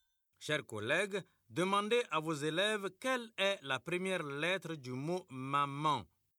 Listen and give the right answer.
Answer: C'est M.